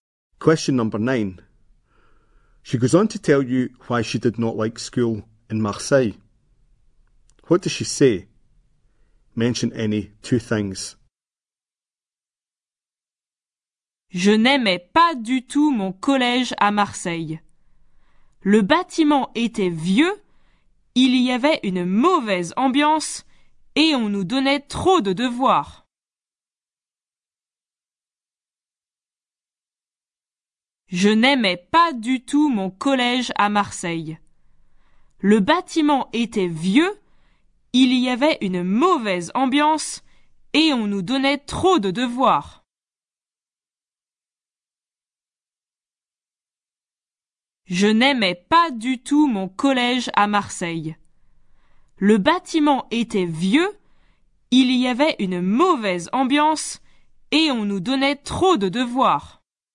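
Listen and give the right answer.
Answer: The building was old; bad atmosphere; too much homework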